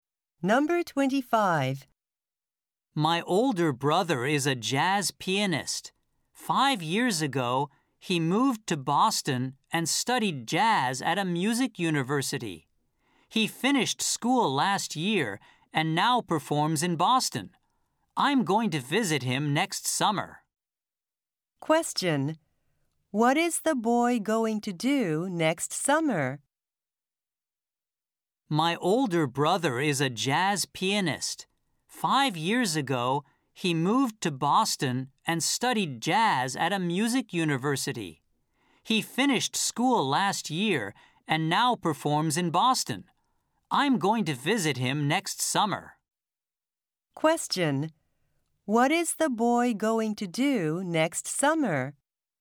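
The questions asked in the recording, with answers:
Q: What is the boy going to do next summer?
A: Visit his older brother in Boston.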